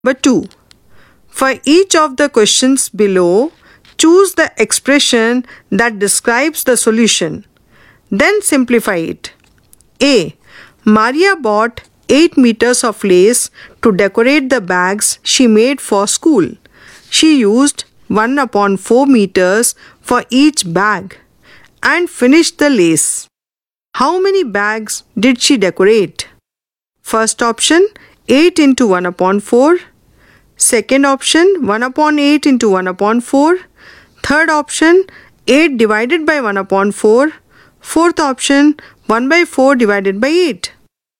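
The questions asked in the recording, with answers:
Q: How many bags did she decorate?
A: Third option: 8 divided by 1 upon 4 (32 bags)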